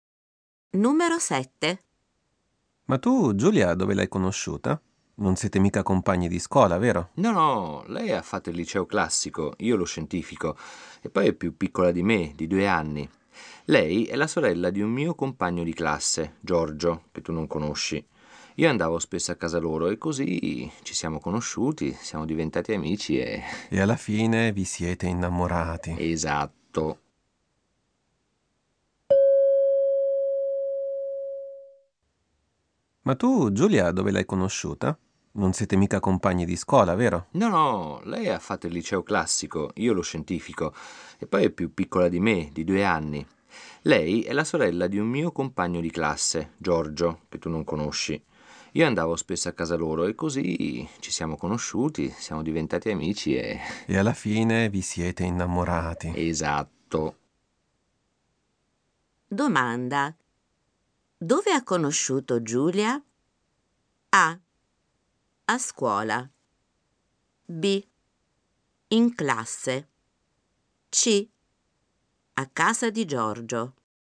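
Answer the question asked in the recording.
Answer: C: A casa di Giorgio.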